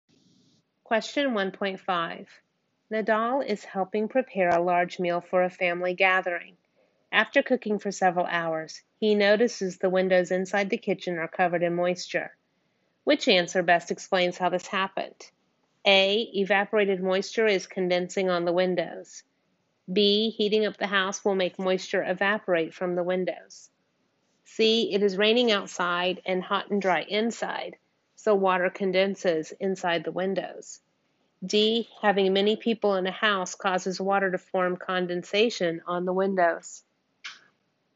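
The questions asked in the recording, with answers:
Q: Which answer best explains how this happened?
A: A: Evaporated moisture is condensing on the windows.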